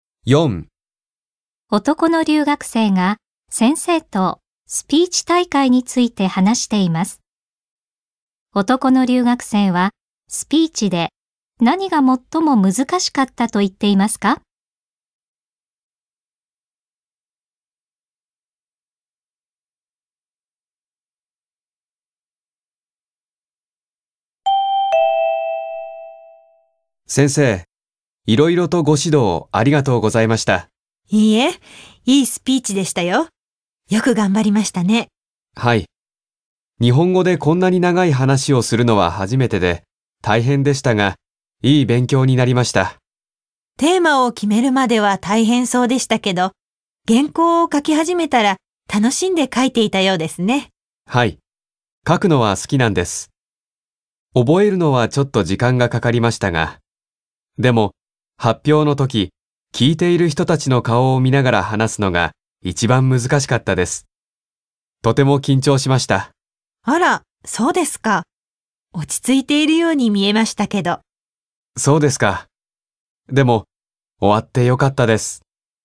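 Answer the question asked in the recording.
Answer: 発表の時、聞いている人たちの顔を見ながら話すこと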